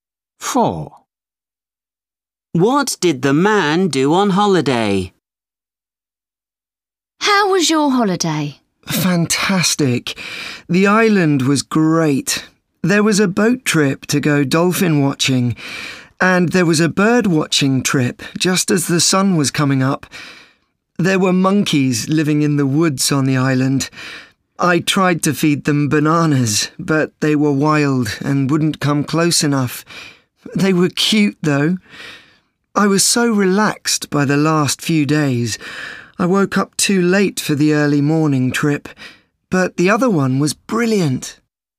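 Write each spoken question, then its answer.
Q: What did the man do on holiday?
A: went on a boat trip to watch dolphins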